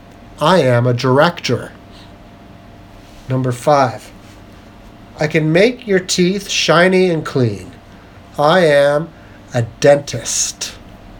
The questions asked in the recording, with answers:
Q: I can make your teeth shiny and clean.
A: I am a dentist.